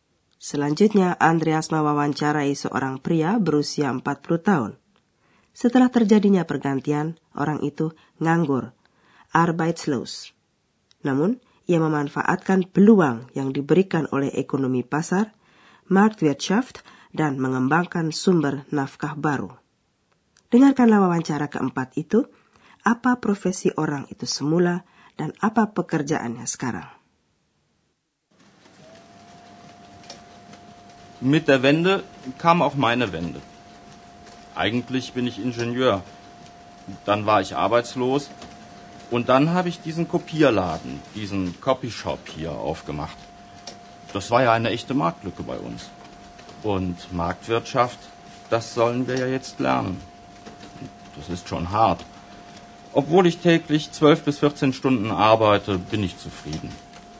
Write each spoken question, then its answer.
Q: apa profesi orang itu semula, dan apa pekerjaannya sekarang.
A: Profesi semula pria itu insinyur.